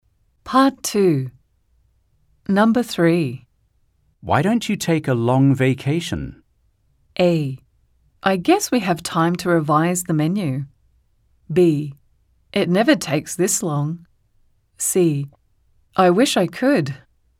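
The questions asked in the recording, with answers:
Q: Why don't you take a long vacation?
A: C: I wish I could.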